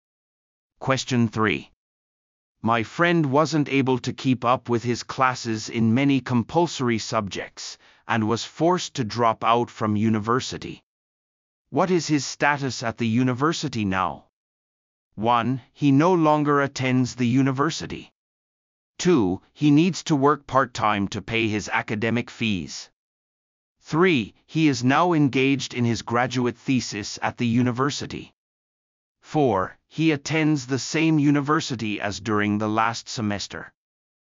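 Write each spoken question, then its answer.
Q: What is his status at the university now?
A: 1: He no longer attends the university.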